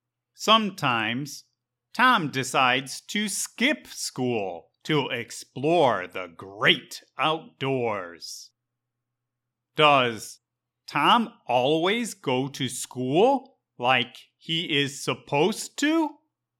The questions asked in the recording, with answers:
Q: Does Tom always go to school like he is supposed to?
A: No. Sometimes Tom decides to skip school so he can explore the great outdoors.